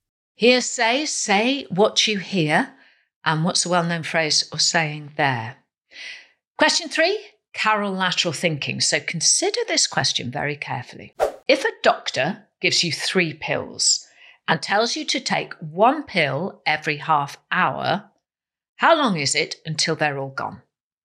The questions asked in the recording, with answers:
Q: If a doctor gives you three pills and tells you to take one pill every half hour, how long is it until they're all gone?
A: The answer, in fact, is 1 hour.